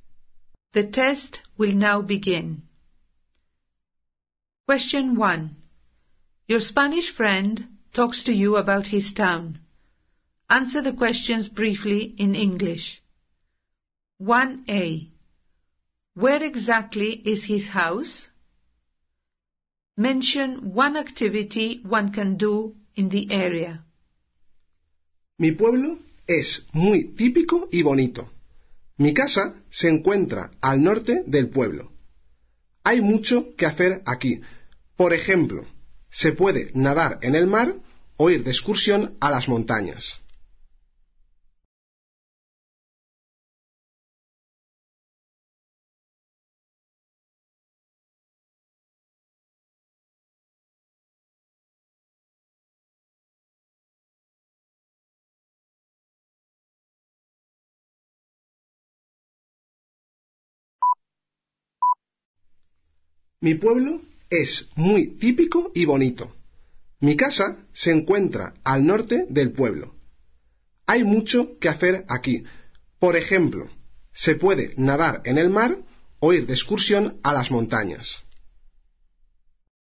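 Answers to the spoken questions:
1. In the north of the town
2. Swim in the sea or go hiking in the mountains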